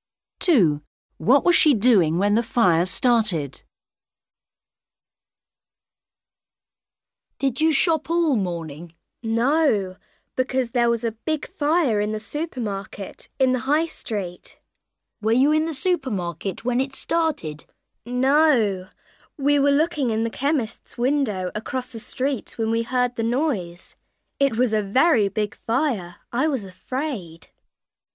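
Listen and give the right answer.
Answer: looking in the chemist's window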